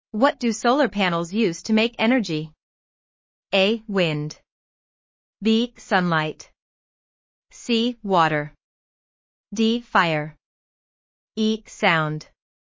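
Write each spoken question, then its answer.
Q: What do solar panels use to make energy?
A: B: Sunlight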